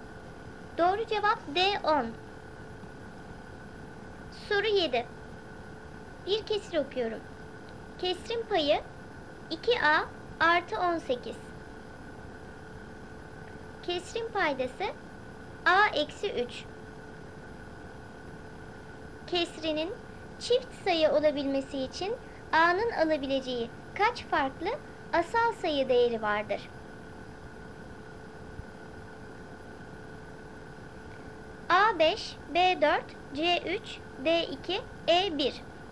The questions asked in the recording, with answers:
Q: Kesrinin çift sayı olabilmesi için A'nın alabileceği kaç farklı asal sayı değeri vardır?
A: Doğru cevap C 3.